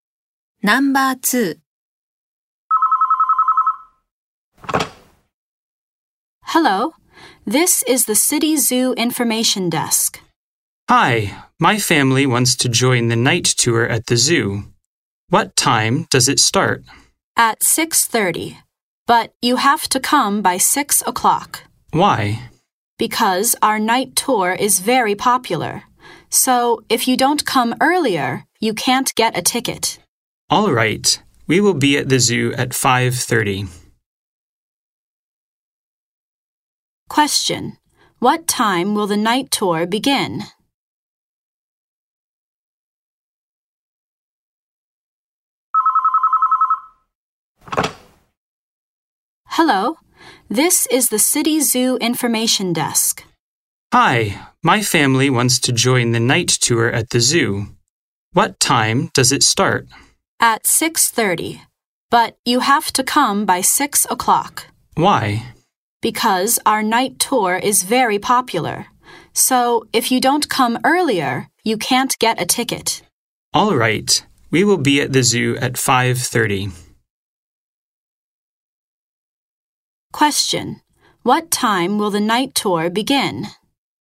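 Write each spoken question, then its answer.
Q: What time will the night tour begin?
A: At 6:30.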